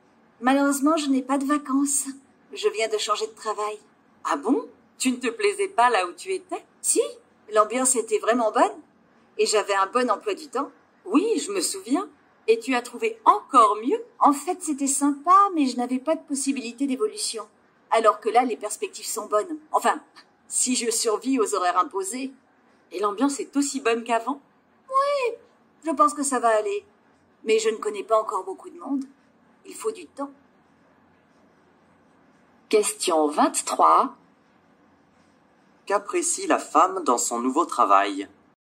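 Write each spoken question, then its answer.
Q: Qu'apprécie la femme dans son nouveau travail?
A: Les perspectives d'évolution (les perspectives sont bonnes).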